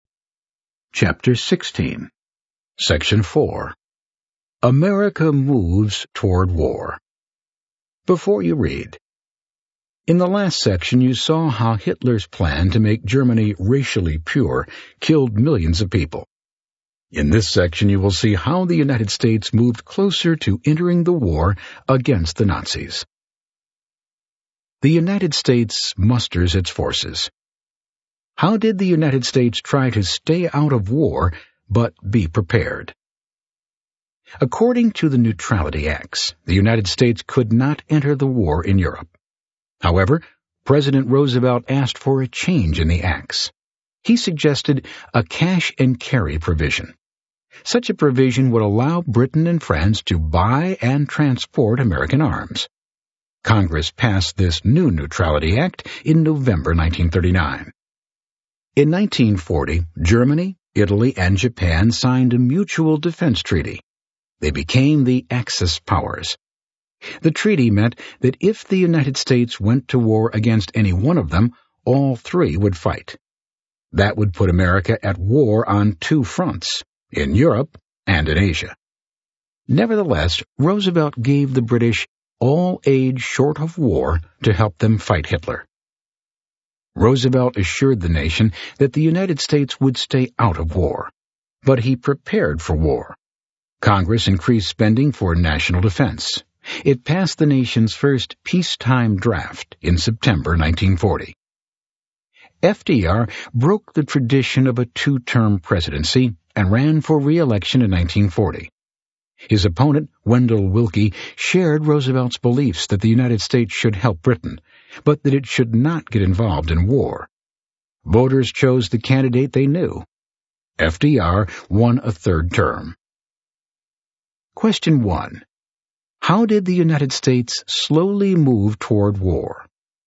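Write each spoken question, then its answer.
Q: How did the United States slowly move toward war?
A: It allowed cash-and-carry arms sales to Britain and France, increased defense spending and passed the first peacetime draft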